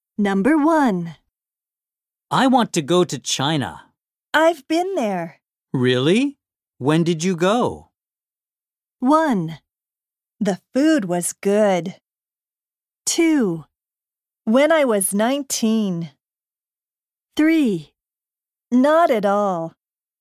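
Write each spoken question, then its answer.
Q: Really? When did you go?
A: 2: When I was 19.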